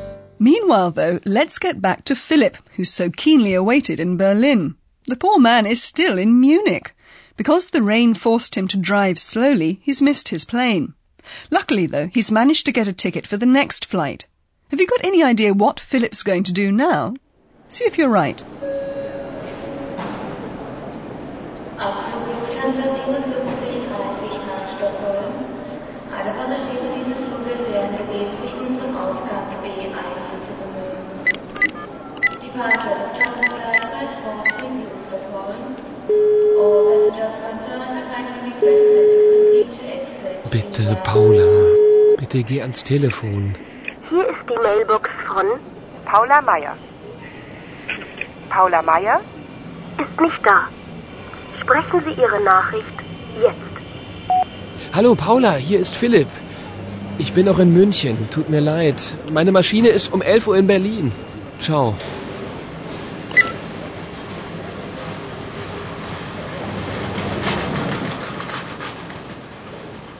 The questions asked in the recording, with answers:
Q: Have you got any idea what Philip's going to do now?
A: you most likely did gather that Philip is trying to phone Paula.